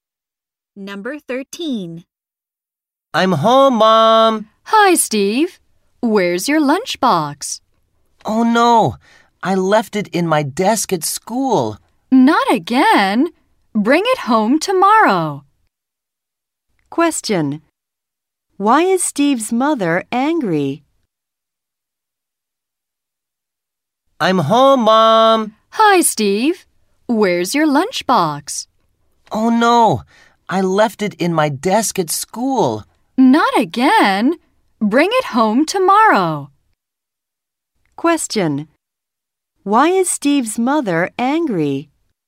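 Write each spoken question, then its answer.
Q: Question. Why is Steve's mother angry?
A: Steve left his lunchbox at school again.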